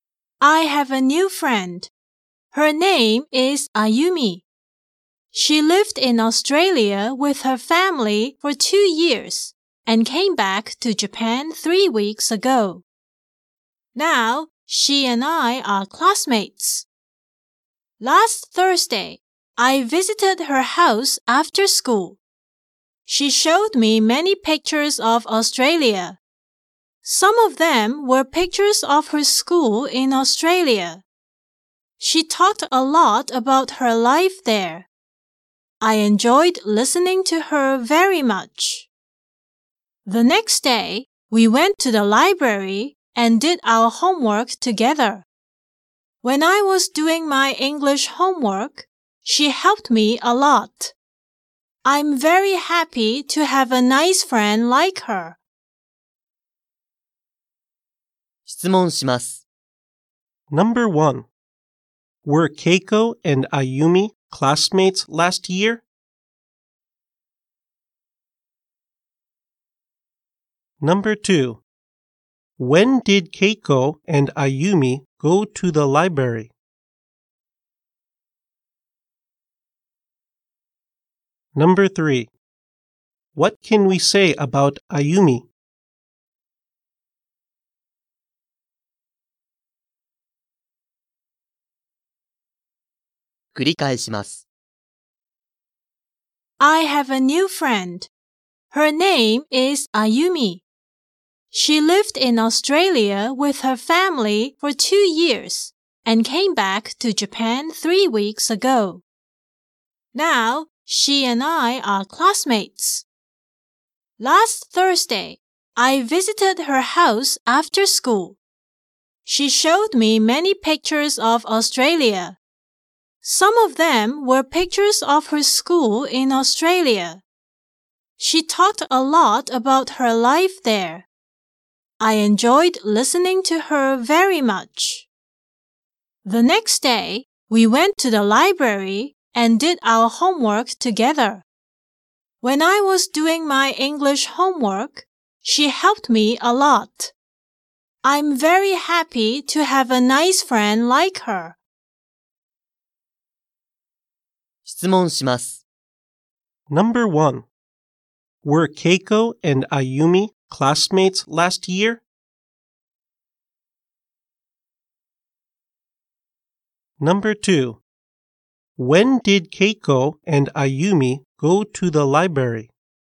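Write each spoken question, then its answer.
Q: Were Keiko and Ayumi classmates last year?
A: No, they weren't.

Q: When did Keiko and Ayumi go to the library?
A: Last Friday.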